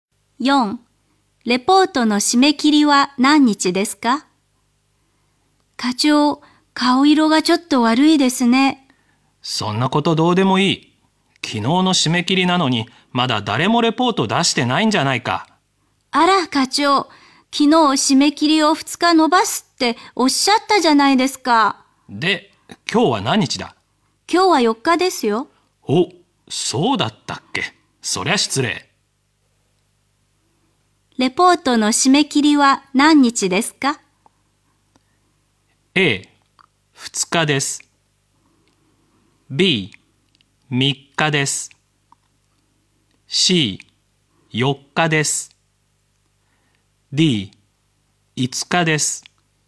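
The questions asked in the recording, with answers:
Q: レポートの締め切りは何日ですか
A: D: 5日です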